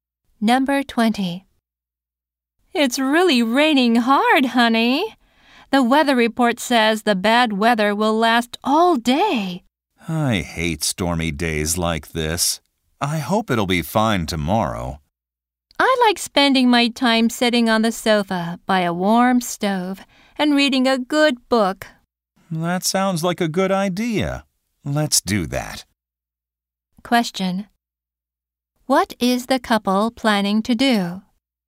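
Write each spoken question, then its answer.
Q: Question. What is the couple planning to do?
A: Stay home reading books by the stove.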